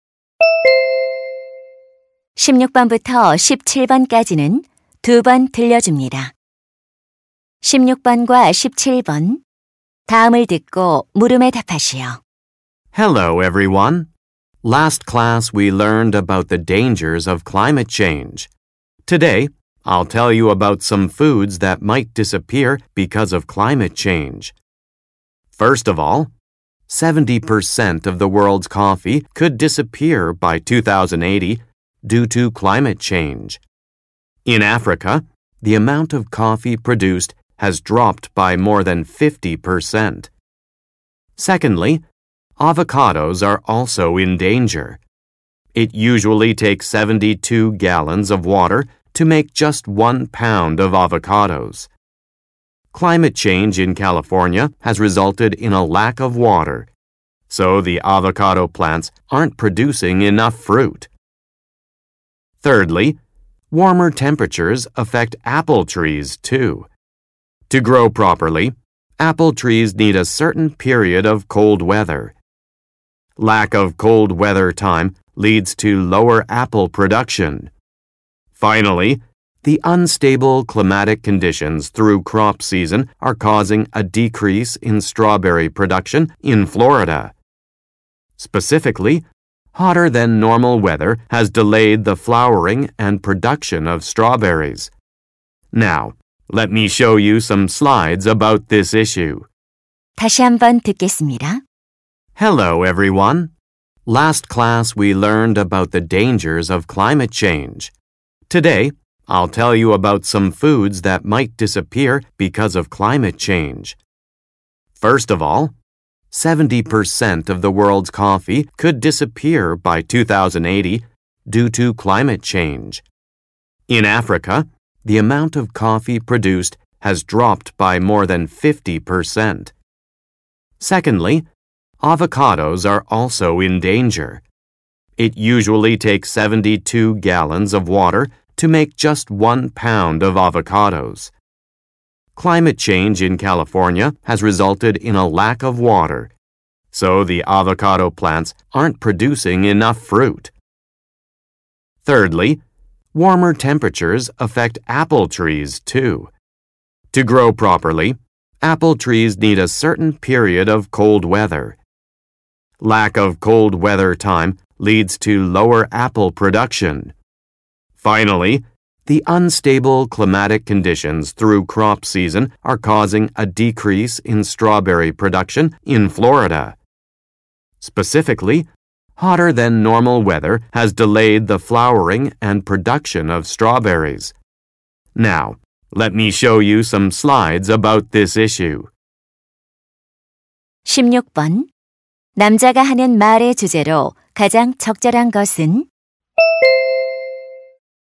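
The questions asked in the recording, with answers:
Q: 남자가 하는 말의 주제로 가장 적절한 것은?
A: 기후 변화로 사라질 수 있는 음식들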